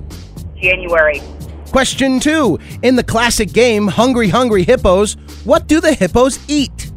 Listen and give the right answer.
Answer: They are marbles.